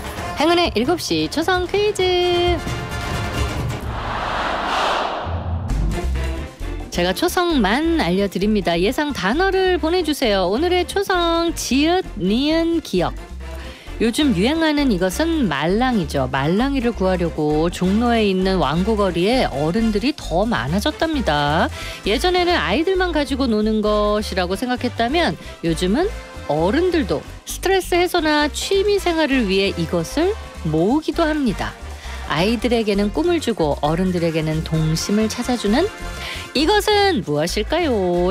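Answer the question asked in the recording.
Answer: 장난감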